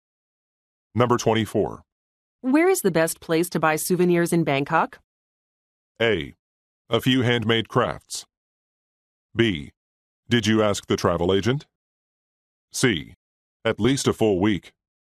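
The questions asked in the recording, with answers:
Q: Where is the best place to buy souvenirs in Bangkok?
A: B: Did you ask the travel agent?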